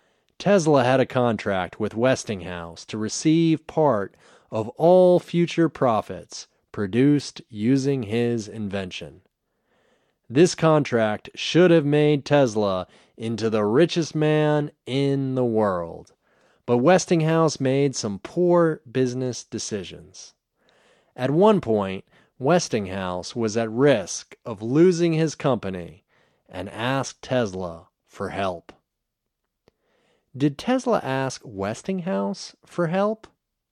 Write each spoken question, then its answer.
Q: Did Tesla ask Westinghouse for help?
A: No, Tesla didn't ask Westinghouse for help.